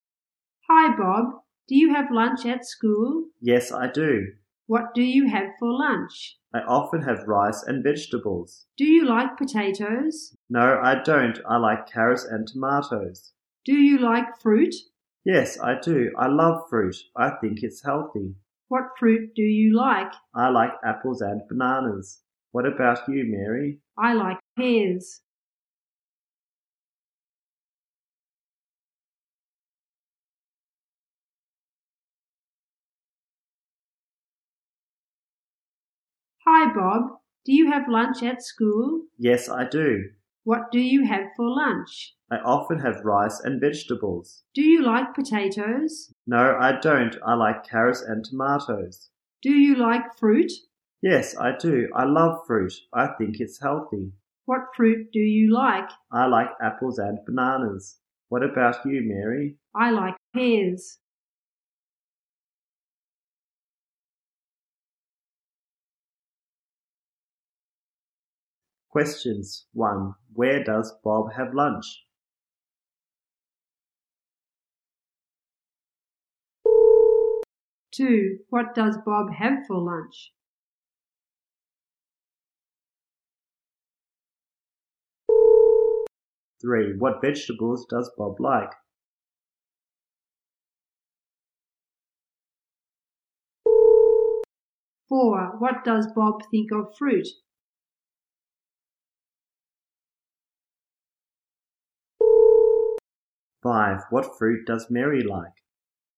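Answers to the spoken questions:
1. At school
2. Rice and vegetables
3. Carrots and tomatoes
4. It's healthy
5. Pears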